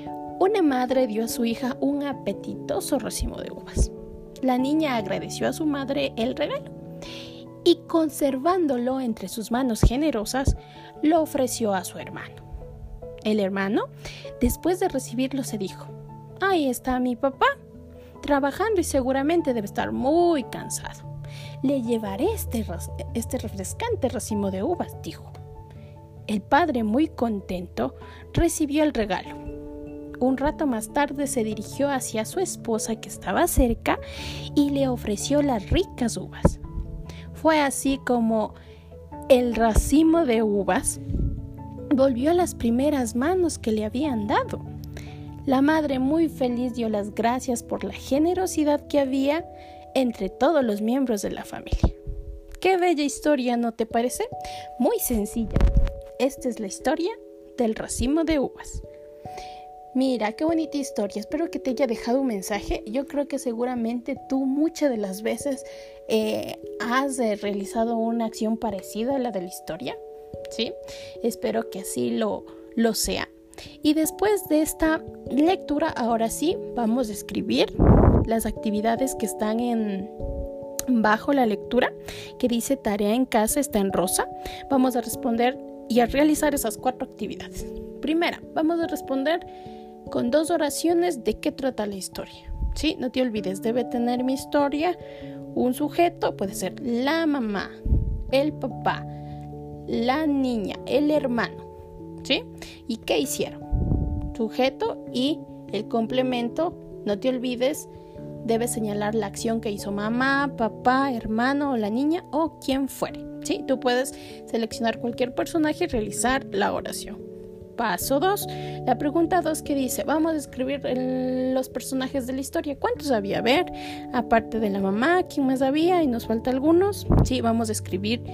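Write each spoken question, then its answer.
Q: La pregunta 2 que dice, vamos a escribir los personajes de la historia.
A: La madre, la hija (niña), el hermano y el padre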